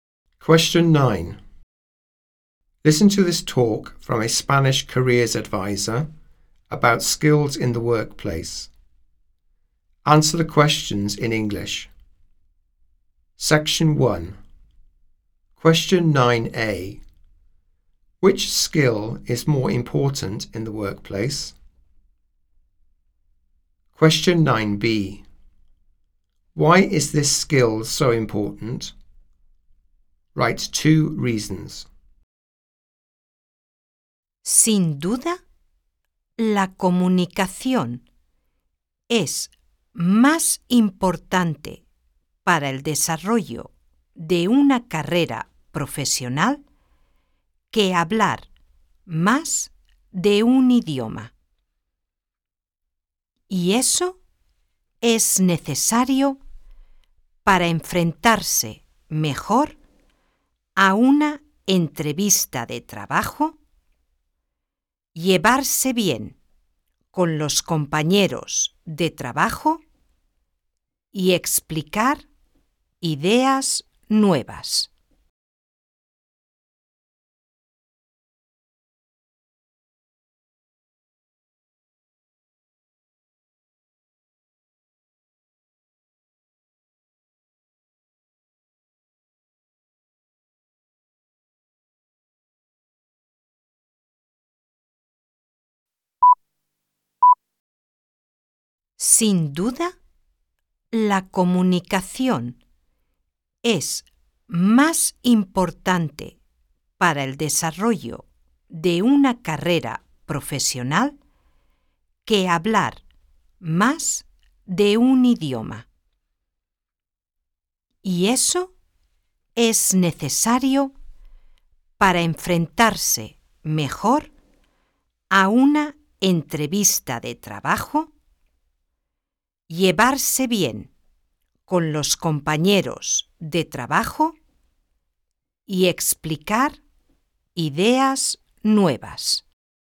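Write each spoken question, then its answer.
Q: Which skill is more important in the workplace?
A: Communication

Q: Why is this skill so important?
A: To do better in job interviews, get on with colleagues, explain new ideas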